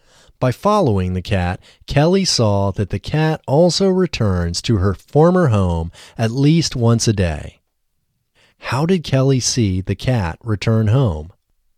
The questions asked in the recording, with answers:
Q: How did Kelly see the cat return home?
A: Kelly saw the cat return home by following it.